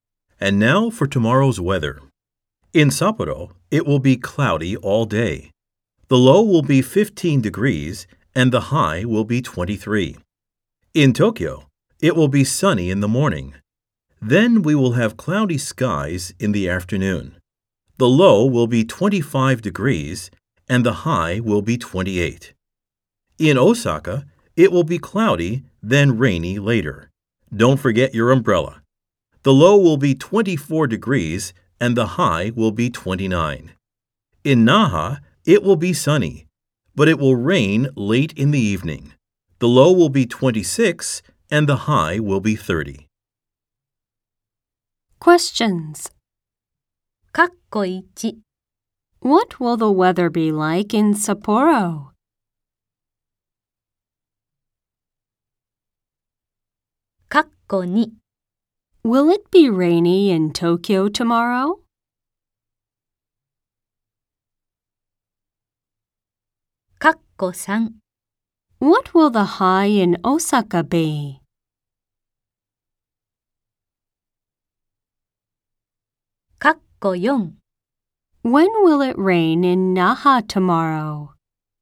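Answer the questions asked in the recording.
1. It will be cloudy all day.
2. No, it won't.
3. 29 degrees
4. Late in the evening.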